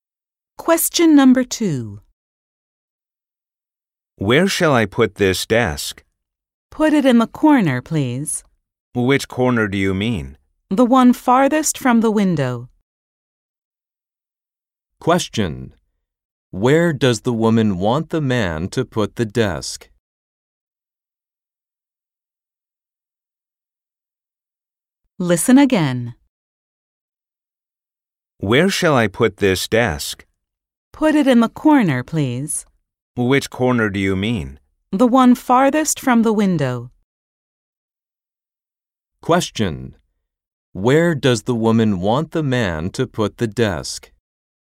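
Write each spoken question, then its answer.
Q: Where does the woman want the man to put the desk?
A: In the corner farthest from the window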